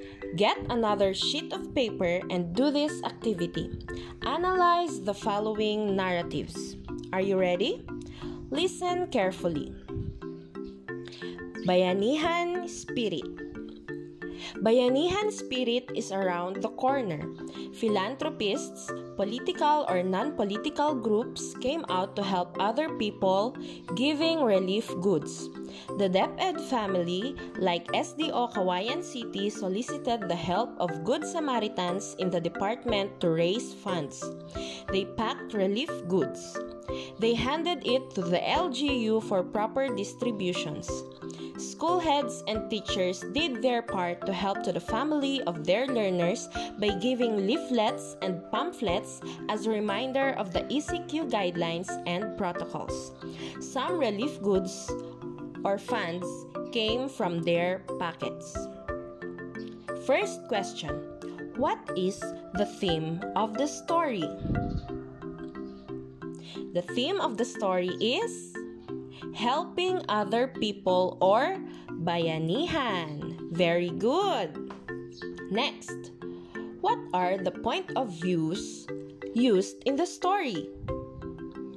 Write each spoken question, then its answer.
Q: What is the theme of the story?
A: The theme of the story is helping other people or bayanihan.